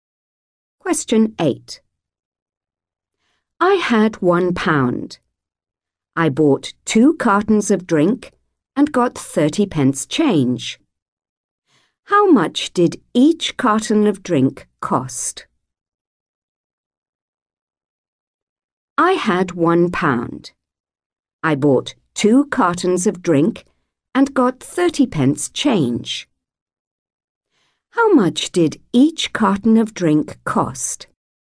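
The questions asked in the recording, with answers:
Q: How much did each carton of drink cost?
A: 35 pence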